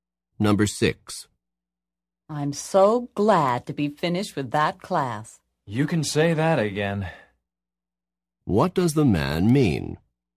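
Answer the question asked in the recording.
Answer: He is also glad the class is finished.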